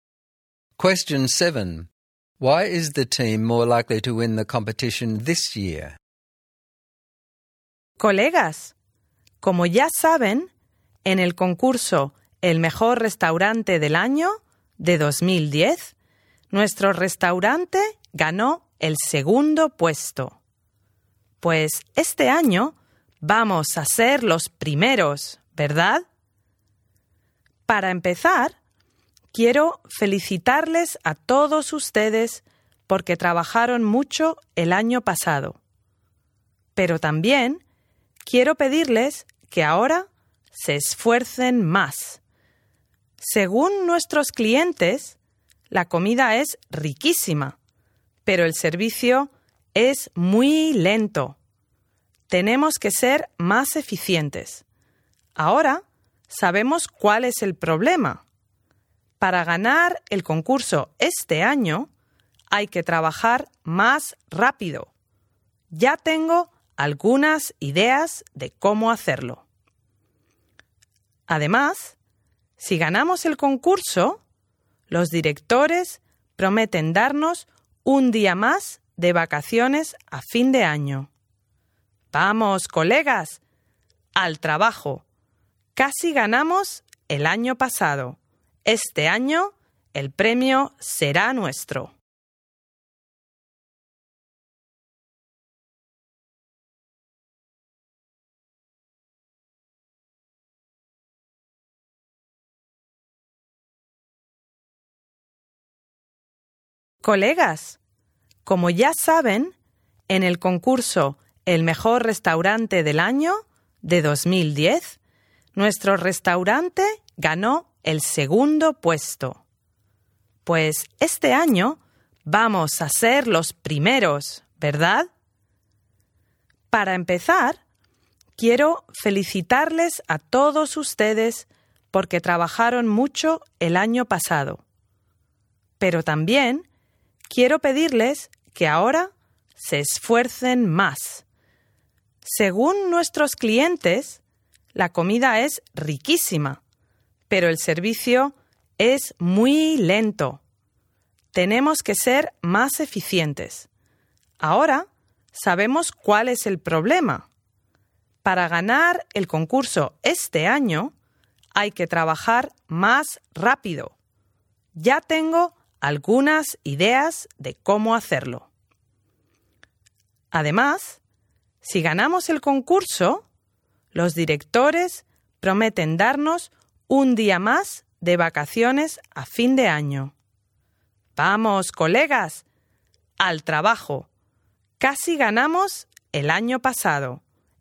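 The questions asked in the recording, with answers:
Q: Why is the team more likely to win the competition this year?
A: They know the problem is slow service, so they will work faster and more efficiently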